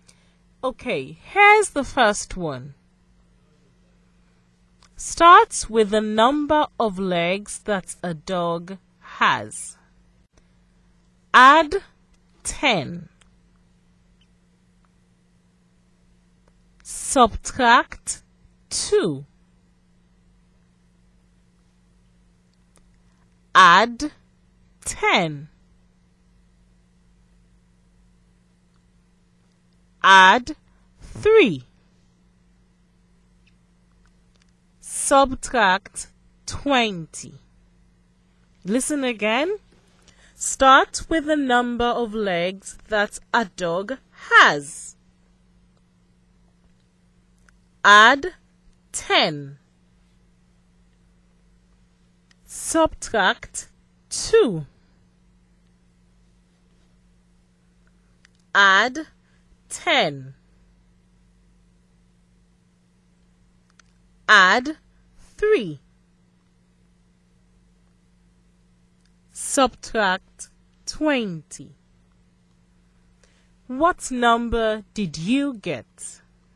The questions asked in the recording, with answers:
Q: What number did you get?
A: The mystery number is 5.